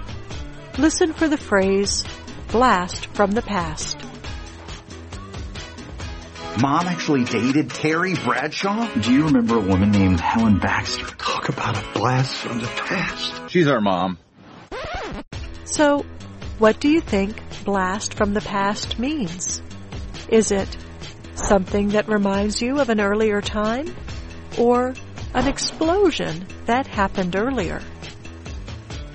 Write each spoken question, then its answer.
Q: So, what do you think blast from the past means?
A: Blast from the past usually means something that reminds you of an earlier time.